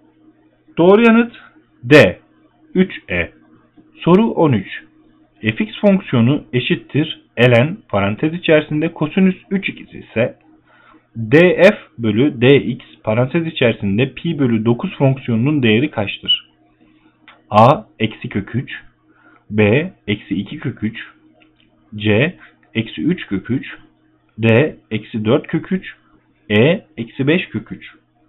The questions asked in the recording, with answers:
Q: f(x) fonksiyonu eşittir ln parantez içerisinde kosinüs 3 ikisi ise df bölü dx parantez içerisinde pi bölü 9 fonksiyonunun değeri kaçtır?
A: Doğru yanıt C eksi 3 kök 3.